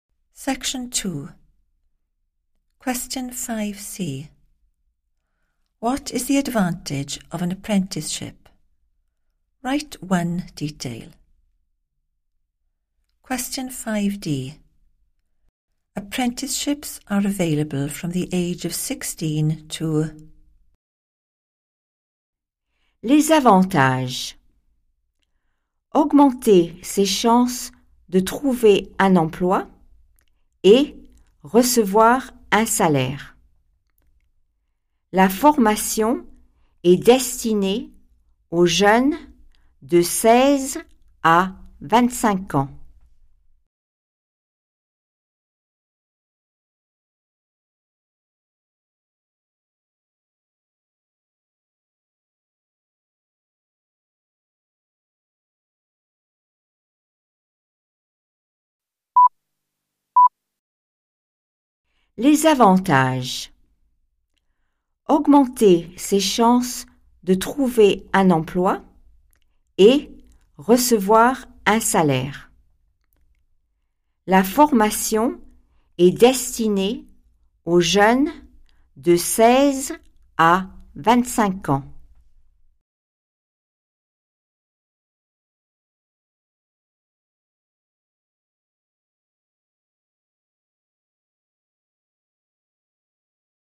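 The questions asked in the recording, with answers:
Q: What is the advantage of an apprenticeship?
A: better chance of finding a job / receiving a salary

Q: Apprenticeships are available from the age of 16 to...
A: 25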